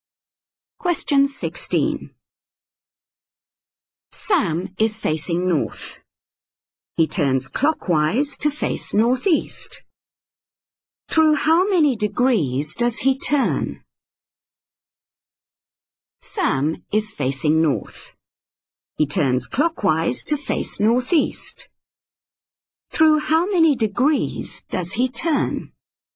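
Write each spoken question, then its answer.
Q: Through how many degrees does he turn?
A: 45 degrees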